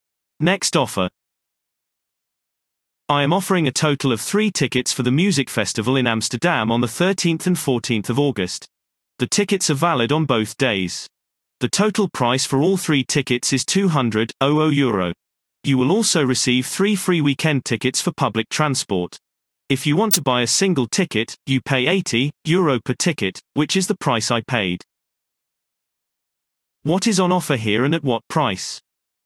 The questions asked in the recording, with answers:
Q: What is on offer here and at what price?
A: Response. 3 tickets for the music festival in Amsterdam for €200.